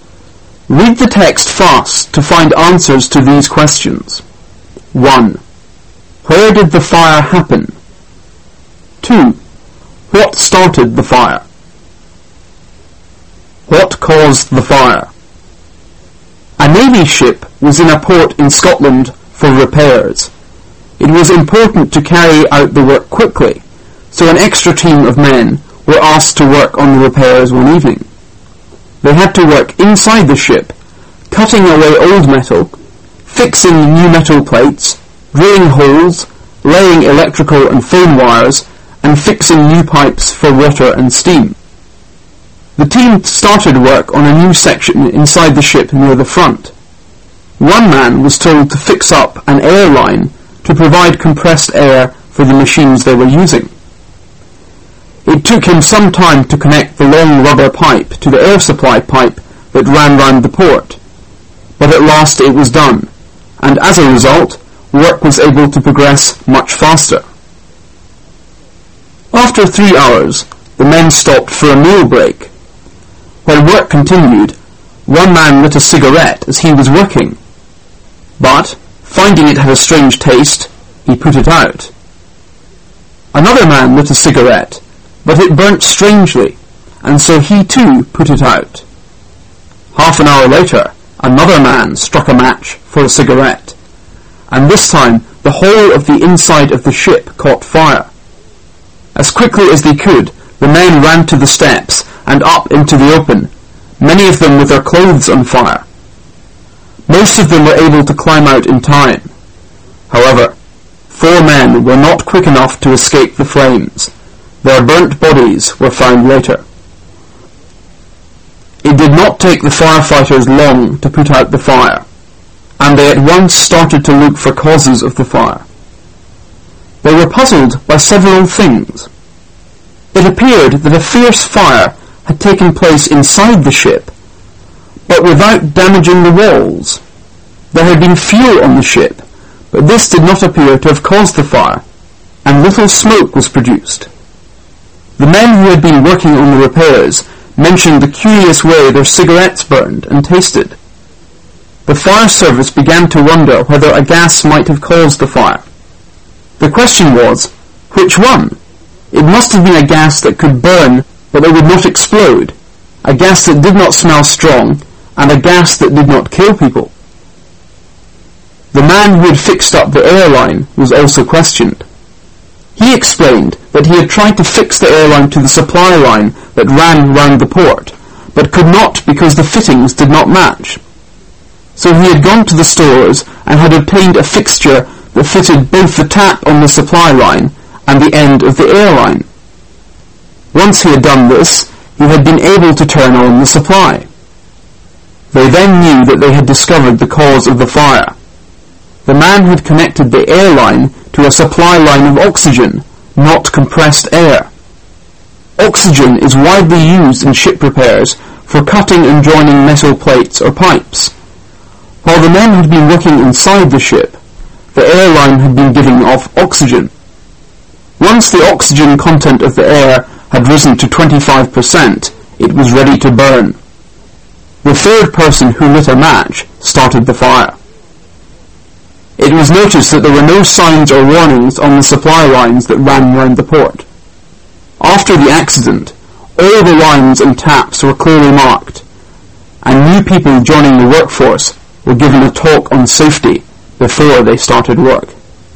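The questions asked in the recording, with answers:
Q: Where did the fire happen?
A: Inside a Navy ship being repaired in a port in Scotland

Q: What started the fire? What caused the fire?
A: A man lit a match in air full of oxygen, because the air line had been connected to an oxygen supply line by mistake instead of compressed air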